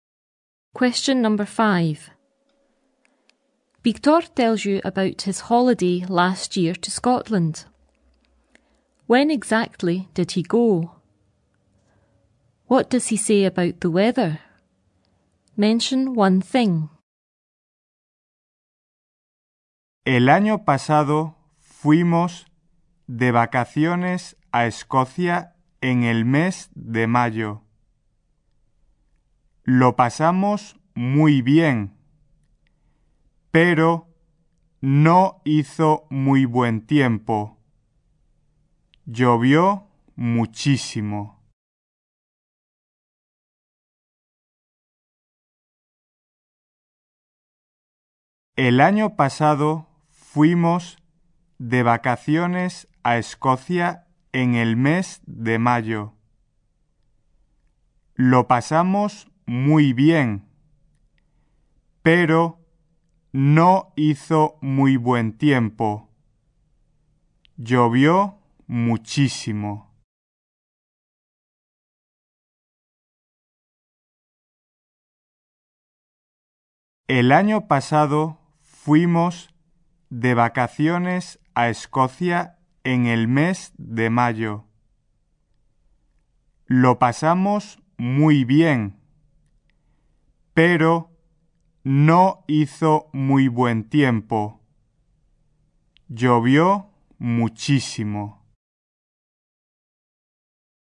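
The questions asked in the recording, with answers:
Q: When exactly did he go?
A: Last year in May

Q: What does he say about the weather?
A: It wasn't very good; it rained a lot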